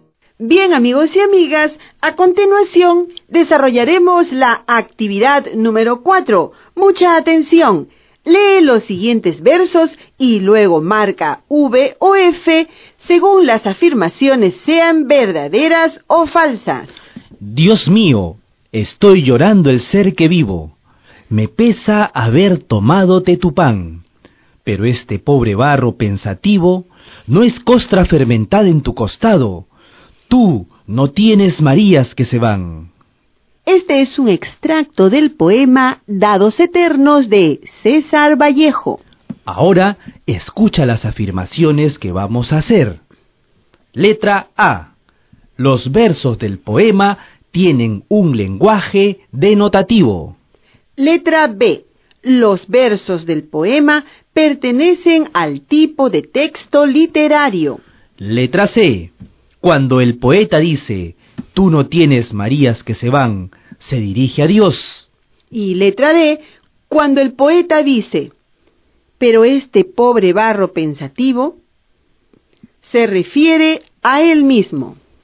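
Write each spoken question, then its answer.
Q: Letra A. Los versos del poema tienen un lenguaje denotativo.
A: Falso

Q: Letra B. Los versos del poema pertenecen al tipo de texto literario.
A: Verdadero

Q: Letra C. Cuando el poeta dice, tú no tienes Marías que se van, se dirige a Dios.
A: Verdadero

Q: Y letra D. Cuando el poeta dice, pero este pobre barro pensativo, se refiere a él mismo.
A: Verdadero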